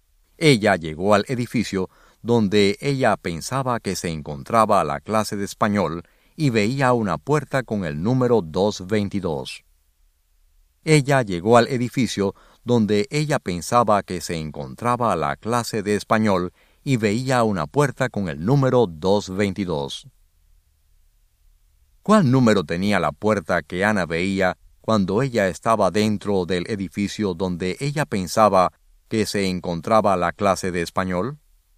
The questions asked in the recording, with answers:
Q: ¿Cuál número tenía la puerta que Ana veía cuando ella estaba dentro del edificio donde ella pensaba que se encontraba la clase de español?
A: El número de la puerta era el número 222.